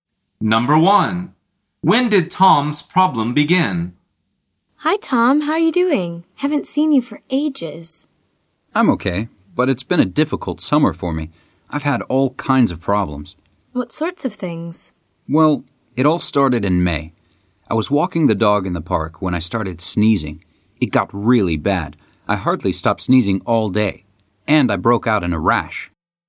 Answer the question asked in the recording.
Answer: The answer is in May.